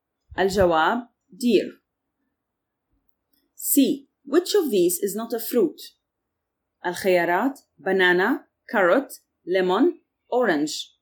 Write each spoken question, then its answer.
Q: Which of these is not a fruit?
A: الجواب carrot.